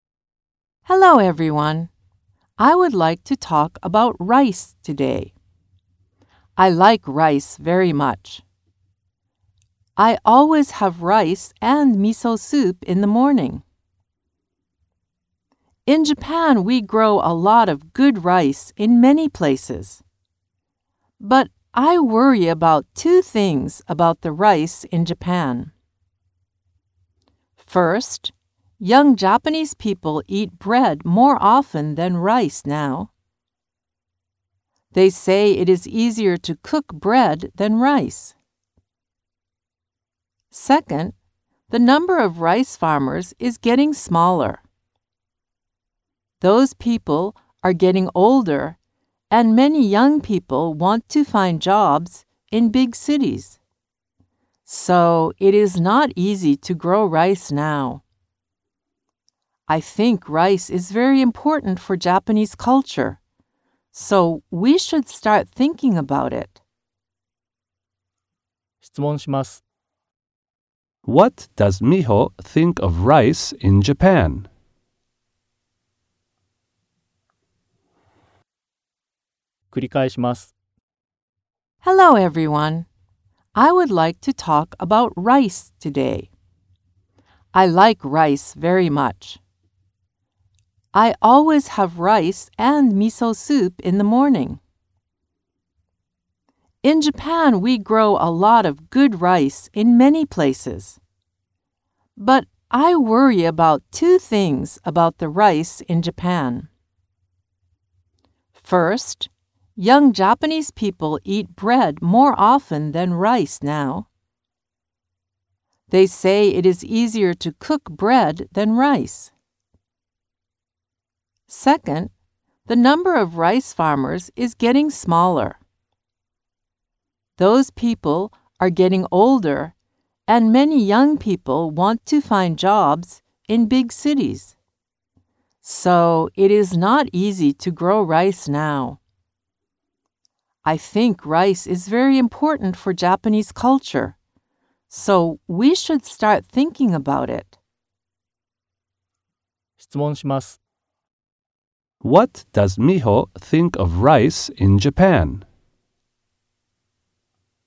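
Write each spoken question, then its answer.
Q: What does Miho think of rice in Japan?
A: It is very important for Japanese culture.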